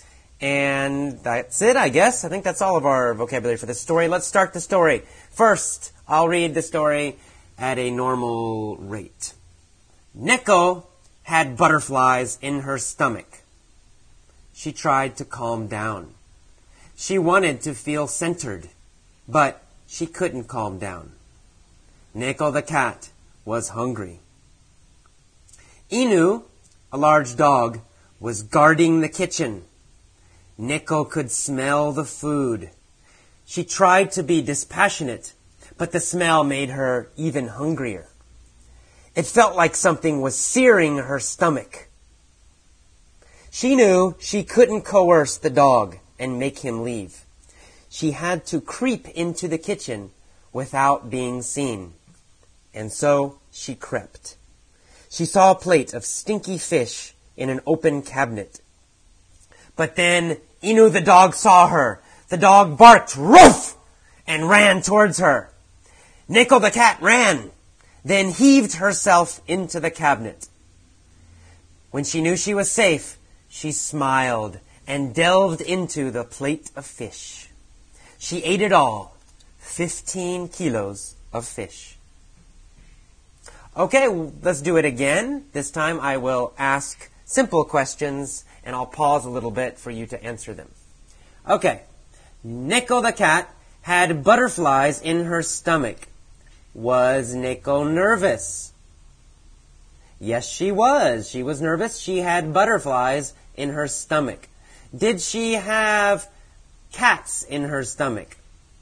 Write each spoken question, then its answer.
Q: Did she have cats in her stomach?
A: No, she didn't. She didn't have cats in her stomach.